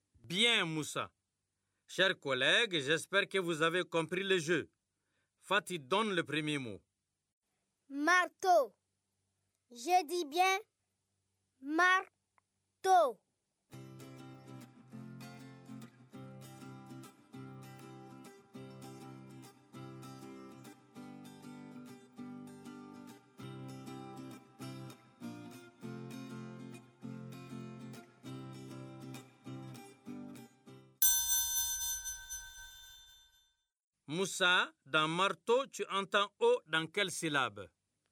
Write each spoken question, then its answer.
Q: Moussa, dans marteau, tu entends O dans quelle syllabe?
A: Monsieur, dans tôt, la deuxième syllabe.